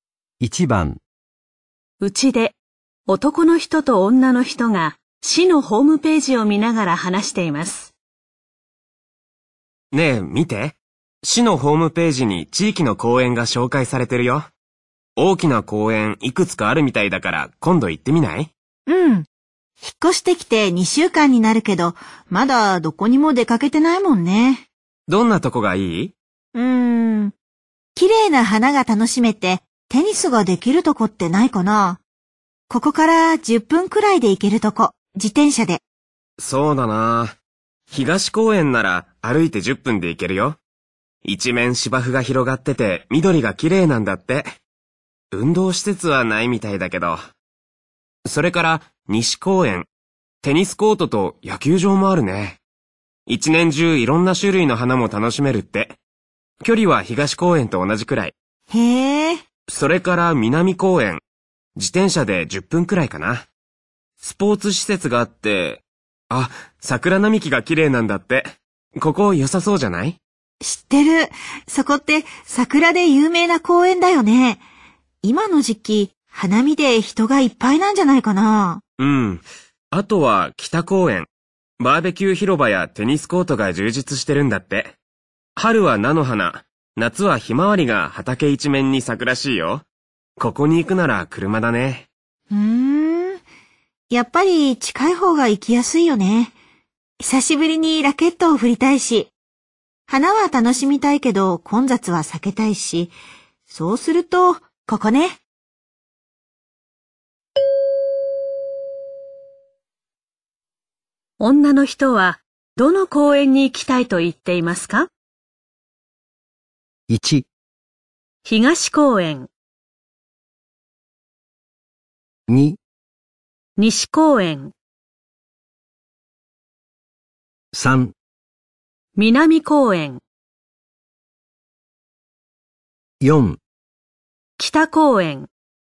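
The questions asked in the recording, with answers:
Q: 女の人はどの公園に行きたいと言っていますか?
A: 2: 西公園。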